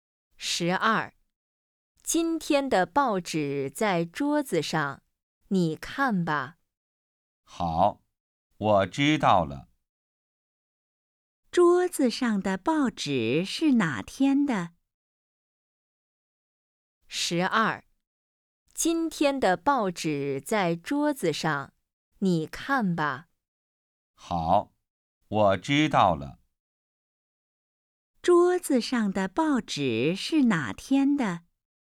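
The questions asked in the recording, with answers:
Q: 桌子上的报纸是哪天的?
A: 今天的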